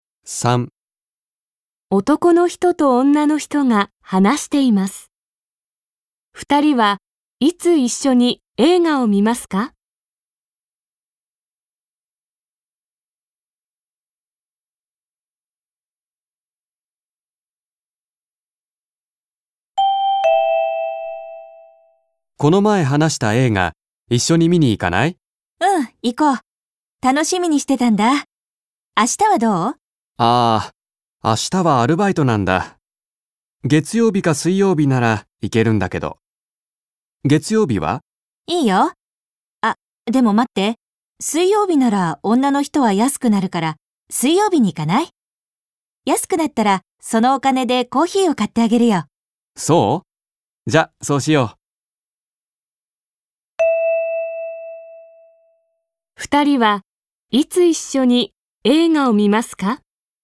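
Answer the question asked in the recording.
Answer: 水曜日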